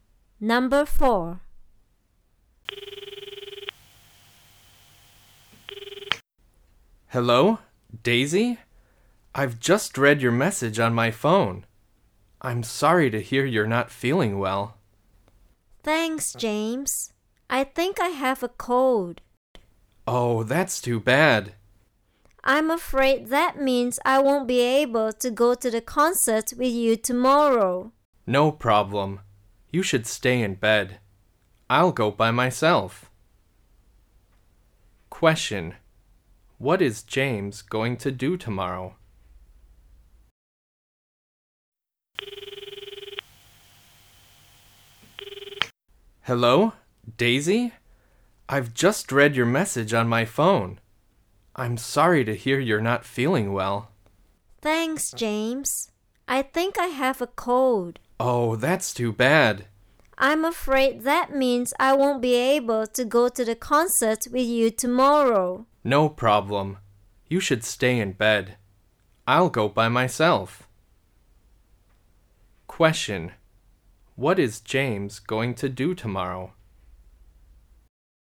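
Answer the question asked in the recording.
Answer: He is going to go to the concert by himself.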